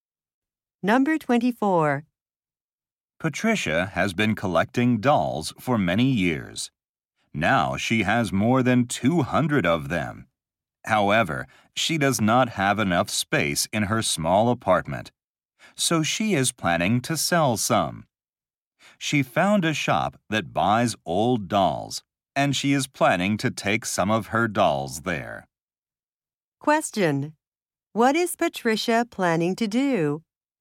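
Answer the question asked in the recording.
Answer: Sell some of her dolls to a shop.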